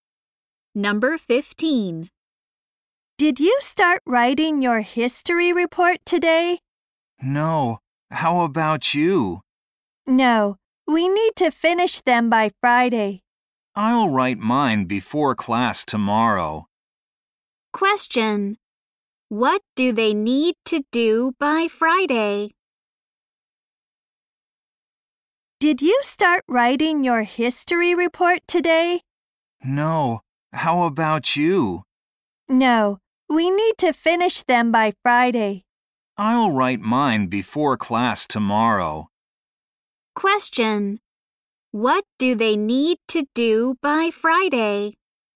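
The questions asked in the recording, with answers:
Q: What do they need to do by Friday?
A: Finish their history reports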